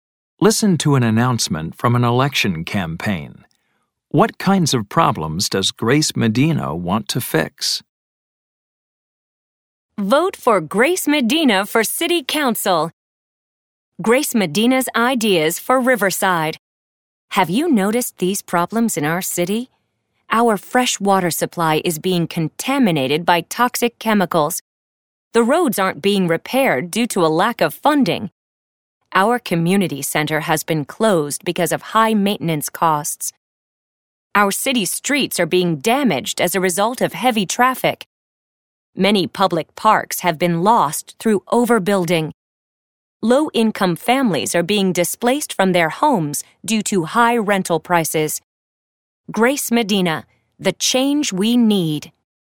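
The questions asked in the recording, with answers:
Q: What kinds of problems does Grace Medina want to fix?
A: City problems: contaminated water, unrepaired roads, closed community center, damaged streets, lost parks, and families displaced by high rents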